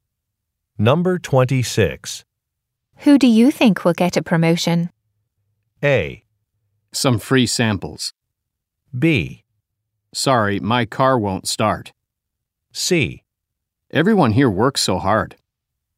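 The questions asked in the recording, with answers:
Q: Who do you think will get a promotion?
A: C: Everyone here works so hard.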